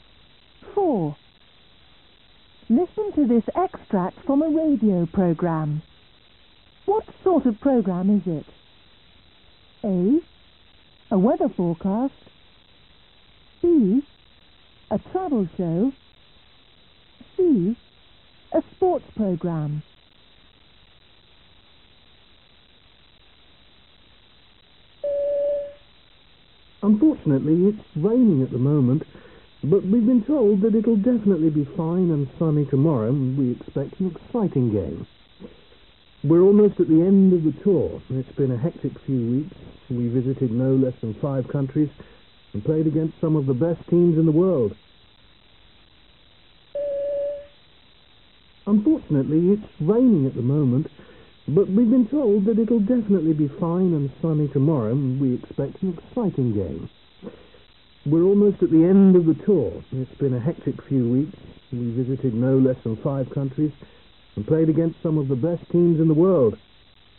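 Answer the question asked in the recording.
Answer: C: A sports program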